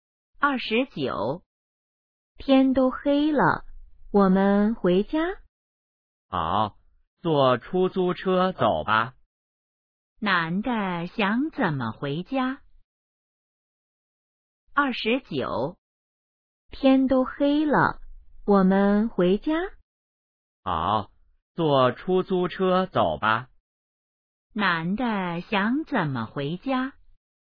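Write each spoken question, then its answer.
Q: 男的想怎么回家?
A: 坐出租车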